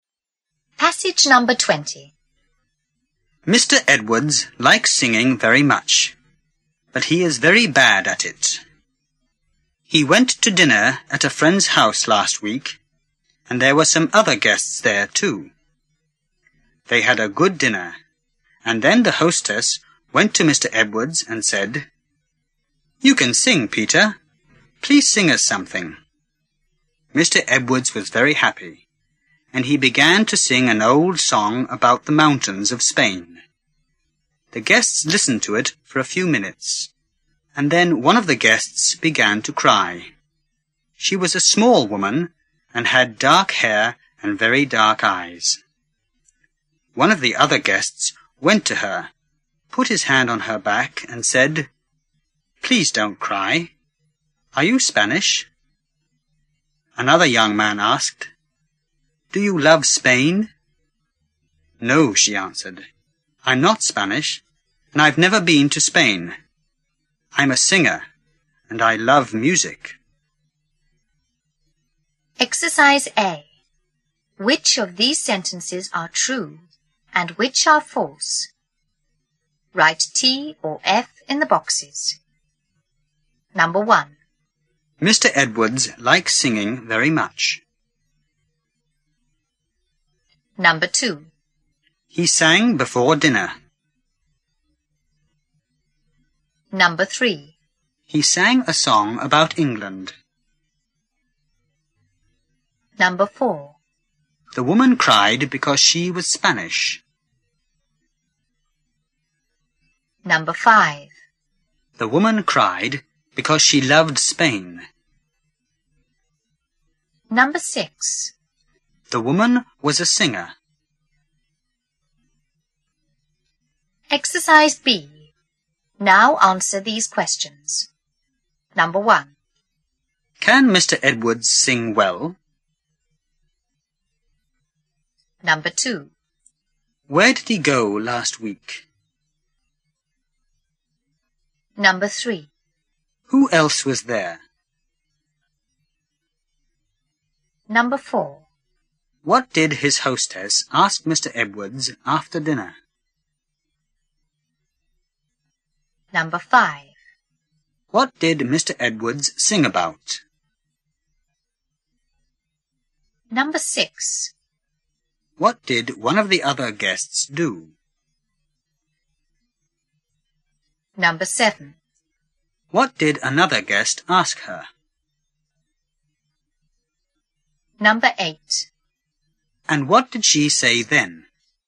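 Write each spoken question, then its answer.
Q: Mr. Edwards likes singing very much.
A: True

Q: He sang before dinner.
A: False

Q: He sang a song about England.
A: False

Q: The woman cried because she was Spanish.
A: False

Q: The woman cried because she loved Spain.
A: False

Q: The woman was a singer.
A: True

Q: Can Mr. Edwards sing well?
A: No, he is very bad at it.

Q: Where did he go last week?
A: To dinner at a friend's house.

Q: Who else was there?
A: Some other guests.

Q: What did his hostess ask Mr. Edwards after dinner?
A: To sing them something.

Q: What did Mr. Edwards sing about?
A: The mountains of Spain.

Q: What did another guest ask her?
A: Do you love Spain?

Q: And what did she say then?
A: No, she wasn't Spanish and had never been to Spain; she was a singer and loved music.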